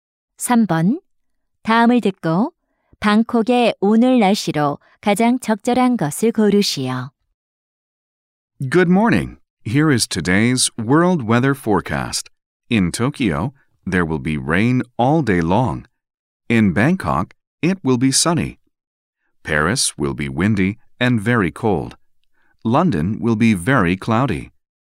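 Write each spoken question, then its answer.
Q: 다음을 듣고 방콕의 오늘 날씨로 가장 적절한 것을 고르시오.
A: 맑음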